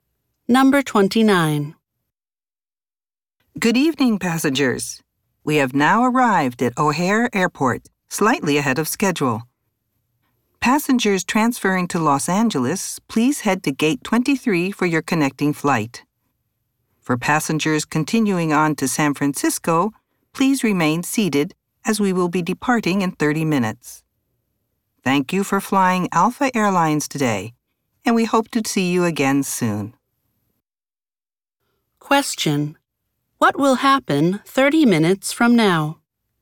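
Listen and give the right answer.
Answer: The plane will depart for San Francisco.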